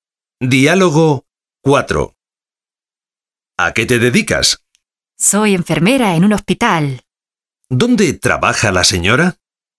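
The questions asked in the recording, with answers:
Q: ¿Dónde trabaja la señora?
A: En un hospital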